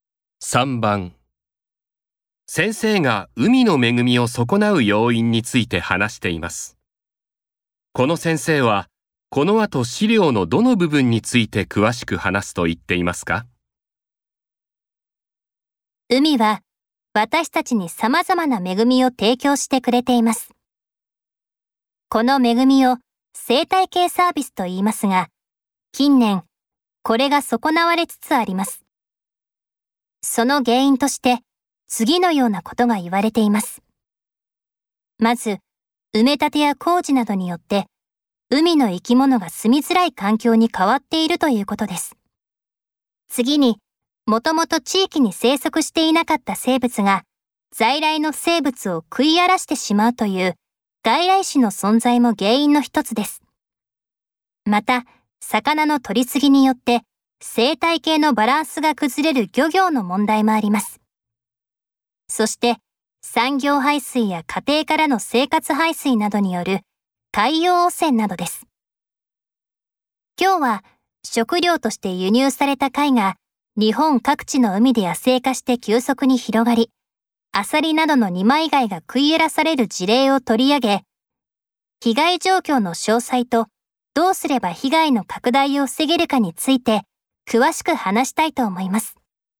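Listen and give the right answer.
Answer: 外来種の存在(外来種による被害)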